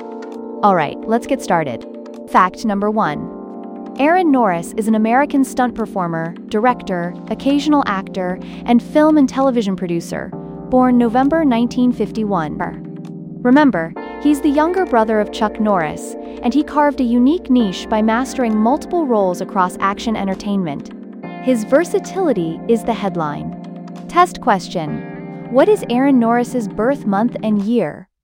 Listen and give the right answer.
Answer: November 1951.